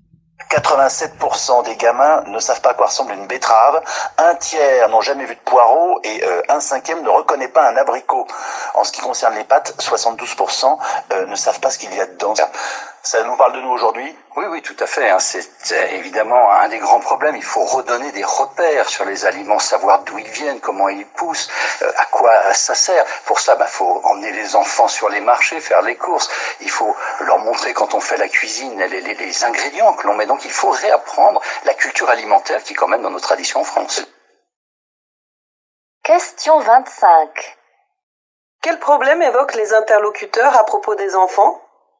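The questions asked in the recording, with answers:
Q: Quel problème évoquent les interlocuteurs à propos des enfants?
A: Ils ne connaissent pas les aliments (ils ne savent pas à quoi ils ressemblent ni d'où ils viennent).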